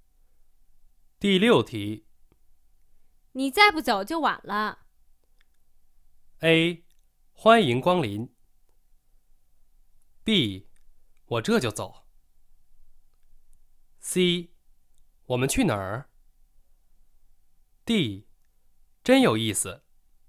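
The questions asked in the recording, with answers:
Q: 你再不走就晚了。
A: B: 我这就走。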